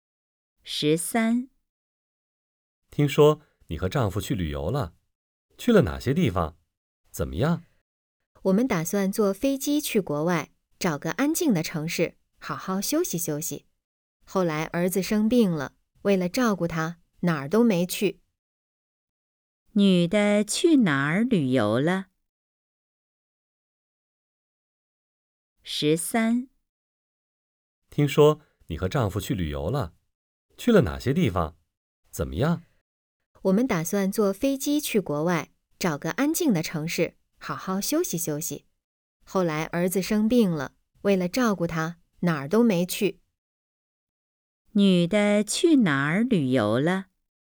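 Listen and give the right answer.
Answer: 哪儿都没去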